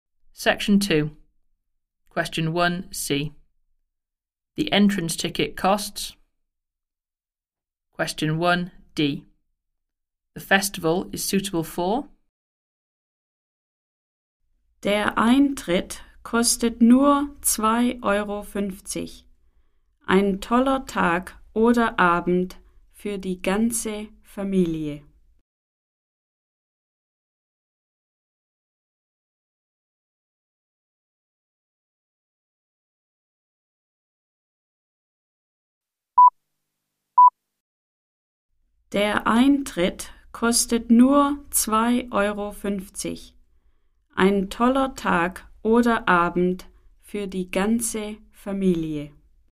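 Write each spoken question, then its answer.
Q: The entrance ticket costs.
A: €2.50

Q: The festival is suitable for.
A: the whole family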